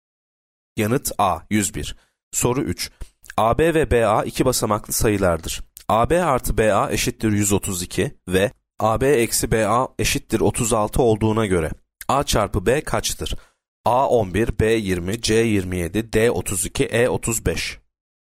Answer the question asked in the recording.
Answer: Yanıt D 32.